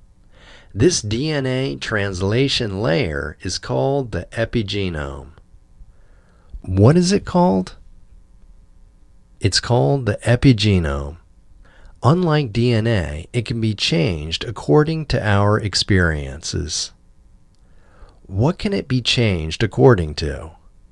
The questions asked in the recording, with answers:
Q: What is it called?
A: It's called the epigenome.